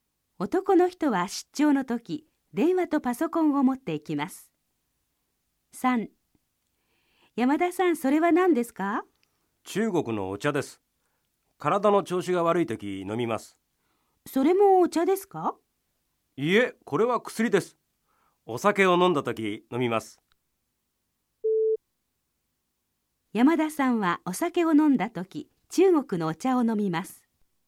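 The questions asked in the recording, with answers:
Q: 山田さんはお酒を飲んだ時中国のお茶を飲みます。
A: ×(お酒を飲んだ時は薬を飲む)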